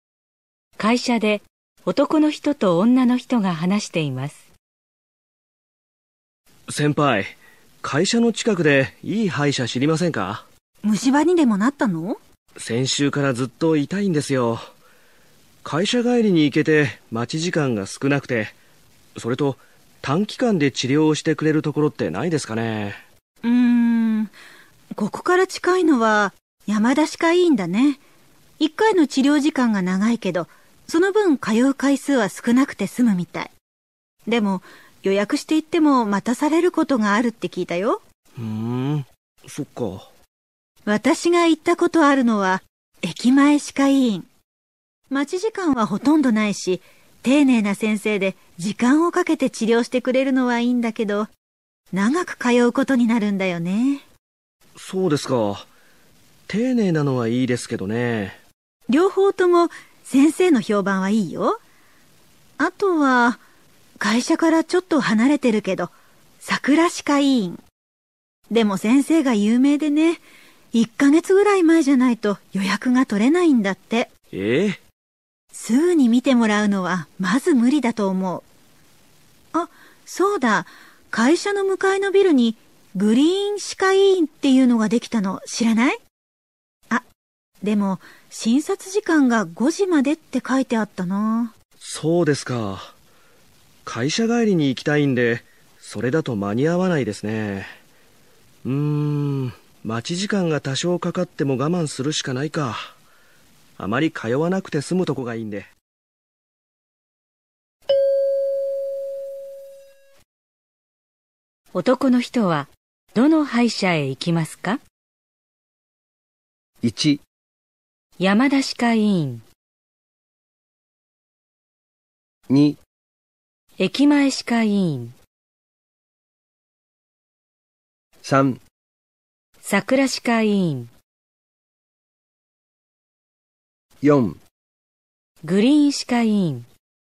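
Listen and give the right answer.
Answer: 1: 山田歯科医院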